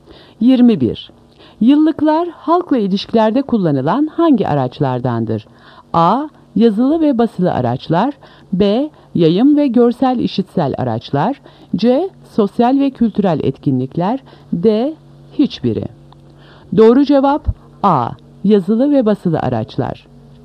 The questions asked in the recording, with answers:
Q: Yıllıklar halkla ilişkilerde kullanılan hangi araçlardandır?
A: Doğru cevap A. Yazılı ve basılı araçlar.